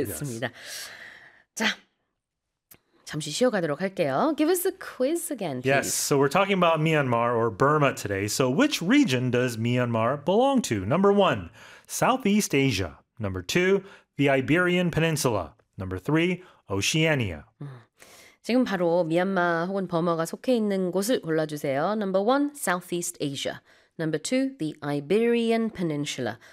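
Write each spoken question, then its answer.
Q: So which region does Myanmar belong to?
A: 1: Southeast Asia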